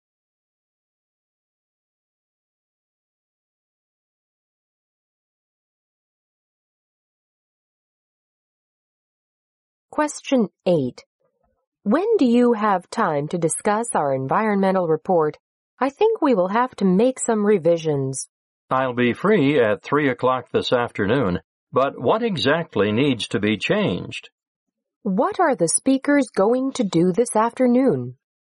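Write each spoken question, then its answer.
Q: What are the speakers going to do this afternoon?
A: Discuss revisions to their environmental report.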